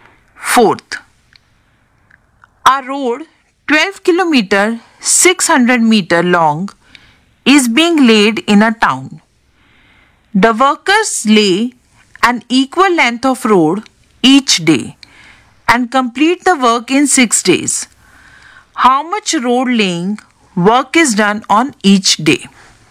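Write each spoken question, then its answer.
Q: How much road laying work is done on each day?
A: 2 km 100 meters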